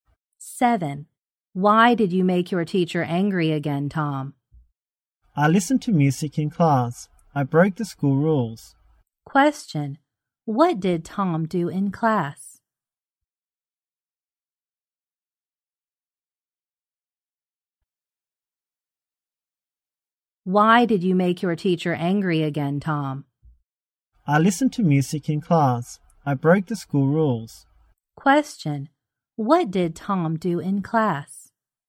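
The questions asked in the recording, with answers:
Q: Question, what did Tom do in class?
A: He listened to music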